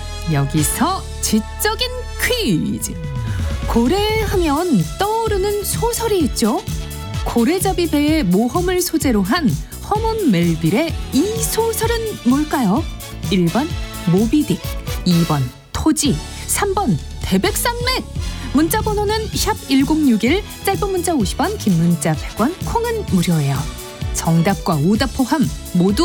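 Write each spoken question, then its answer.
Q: 고래잡이 배의 모험을 소재로 한 허먼 멜빌의 이 소설은 뭘까요?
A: 1번: 모비딕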